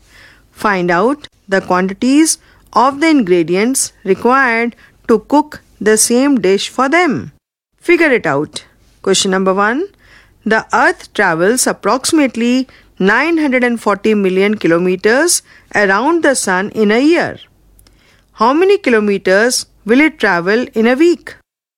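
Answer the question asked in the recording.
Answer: About 18 million km (940 million ÷ 52 weeks ≈ 18.1 million km)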